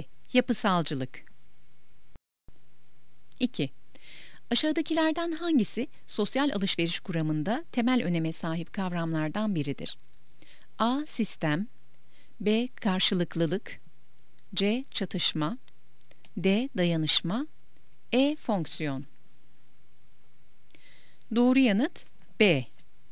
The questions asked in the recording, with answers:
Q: Aşağıdakilerden hangisi sosyal alışveriş kuramında temel öneme sahip kavramlardan biridir?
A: Doğru yanıt B. Karşılıklılık.